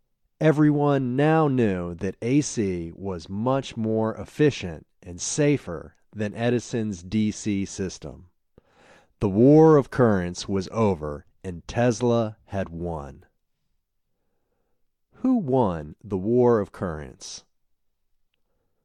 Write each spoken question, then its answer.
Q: Who won the war of currents?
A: Tesla won the war of currents.